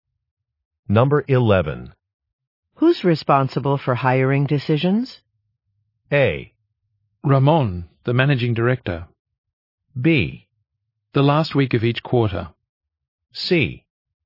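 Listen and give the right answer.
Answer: A: Ramon, the managing director.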